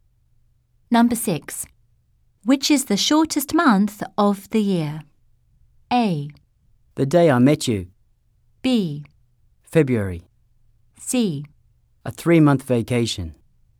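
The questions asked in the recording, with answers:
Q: Which is the shortest month of the year?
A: B: February.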